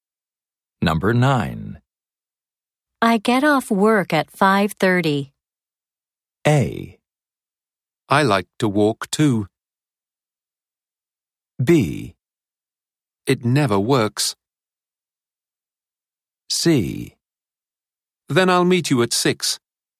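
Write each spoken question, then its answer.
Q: I get off work at 5:30.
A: C: Then I'll meet you at 6.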